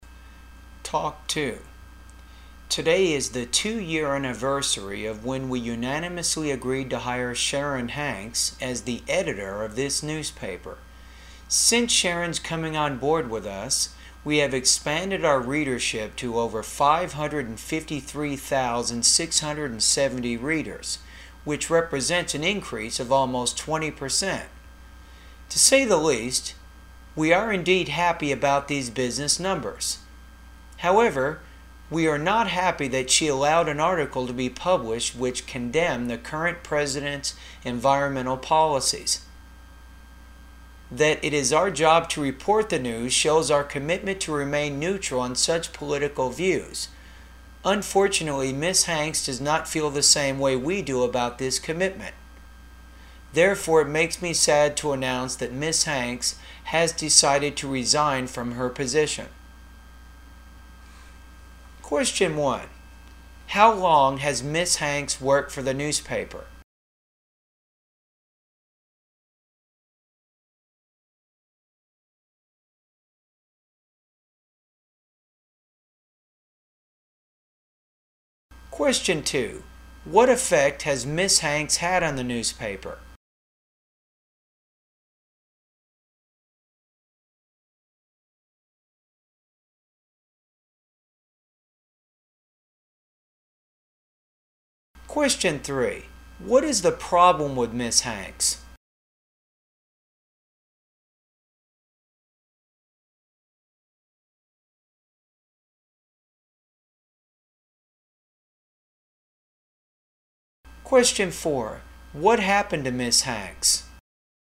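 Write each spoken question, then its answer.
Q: How long has Ms. Hanks worked for the newspaper?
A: Two years

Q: What effect has Ms. Hanks had on the newspaper?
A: Readership increased by almost 20%

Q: What is the problem with Ms. Hanks?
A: She allowed an article condemning the president's environmental policies to be published

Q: What happened to Ms. Hanks?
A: She resigned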